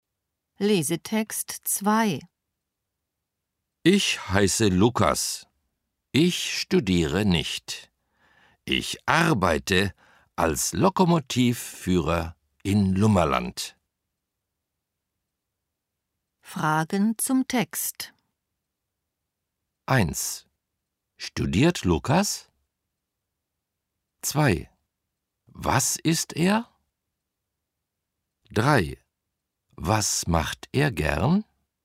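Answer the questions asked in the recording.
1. Nein, er studiert nicht.
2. Lokomotivführer (in Lummerland)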